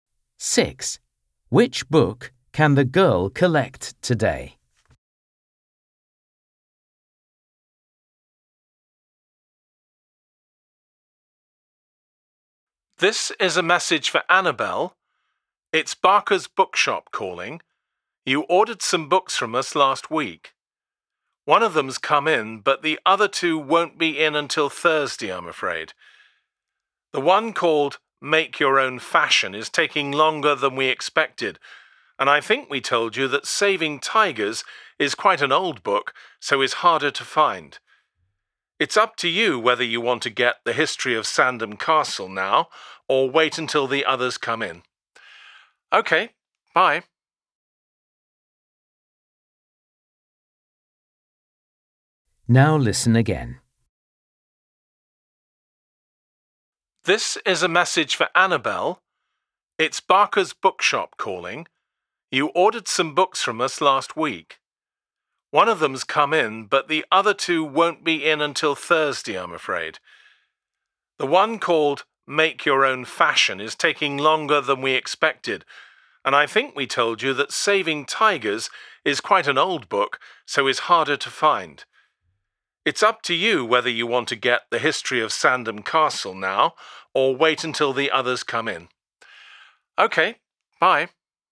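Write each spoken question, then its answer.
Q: Which book can the girl collect today?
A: The History of Sandham Castle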